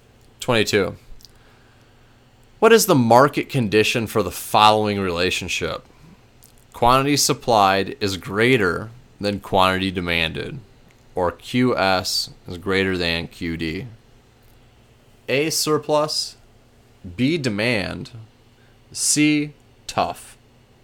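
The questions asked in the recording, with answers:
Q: What is the market condition for the following relationship?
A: A: surplus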